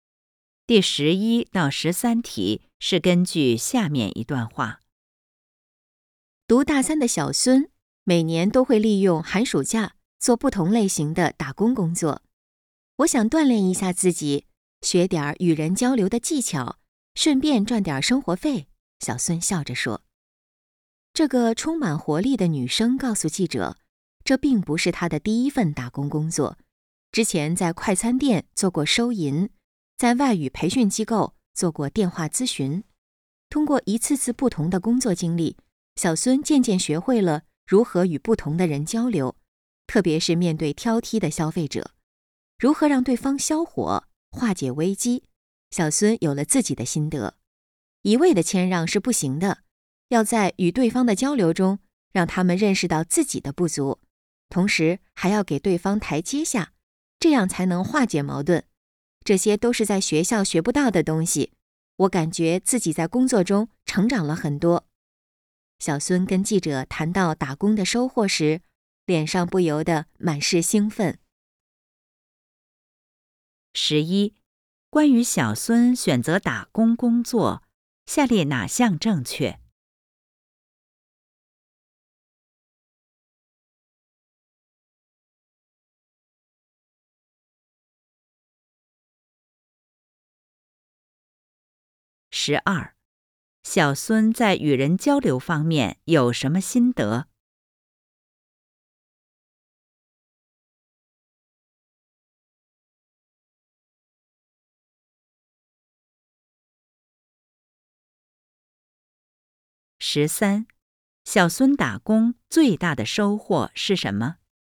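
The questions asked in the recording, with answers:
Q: 小孙在与人交流方面有什么心得?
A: 不能一味谦让,要让对方认识到自己的不足,同时给对方台阶下

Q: 小孙打工最大的收获是什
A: 学到了学校学不到的东西,在工作中成长了很多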